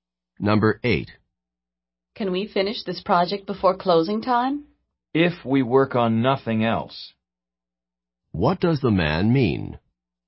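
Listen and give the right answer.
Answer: They can finish only if they work on nothing else.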